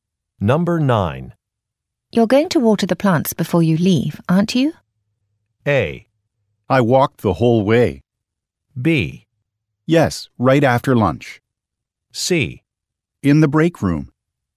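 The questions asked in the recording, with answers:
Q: You're going to water the plants before you leave, aren't you?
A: B: Yes, right after lunch.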